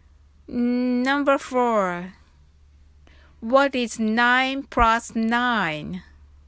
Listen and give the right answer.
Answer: equals 18?